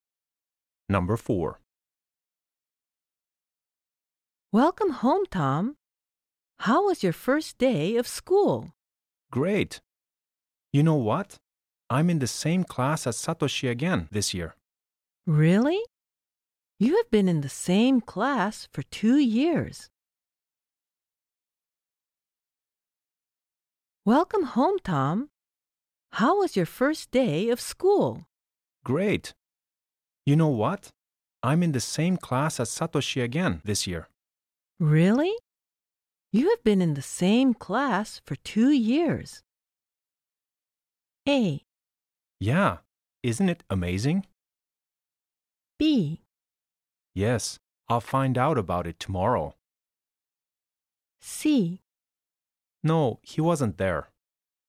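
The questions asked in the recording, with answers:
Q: Really? You have been in the same class for 2 years.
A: A: Yeah, isn't it amazing?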